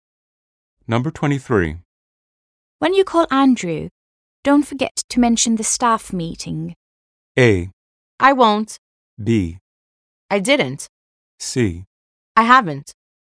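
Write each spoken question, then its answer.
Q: When you call Andrew, don't forget to mention the staff meeting.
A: A: I won't.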